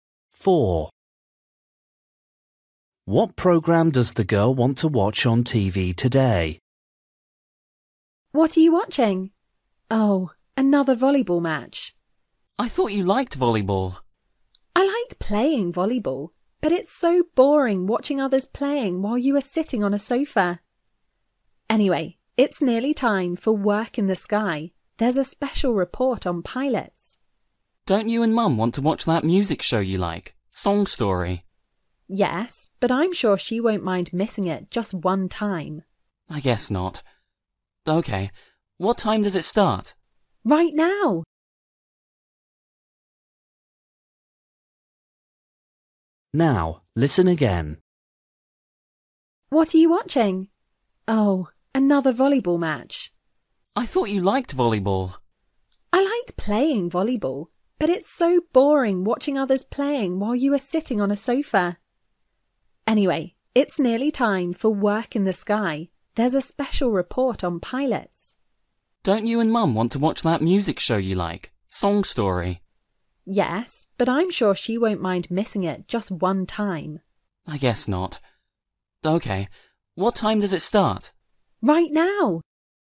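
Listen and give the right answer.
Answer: Work in the Sky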